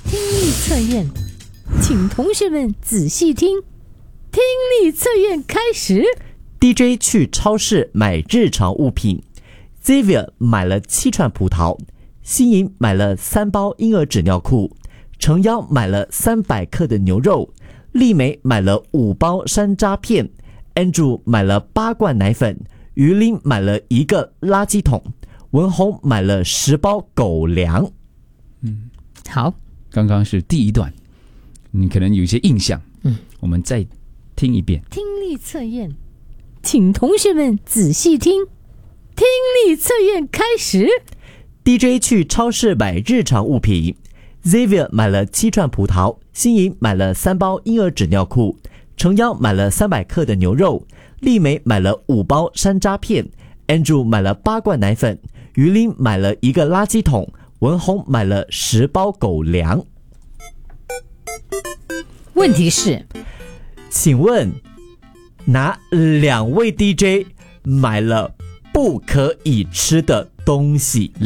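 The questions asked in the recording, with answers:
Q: 请问?哪2位 DJ 买了不可以吃的东西?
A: 新颖(婴儿纸尿裤)和于琳(垃圾桶)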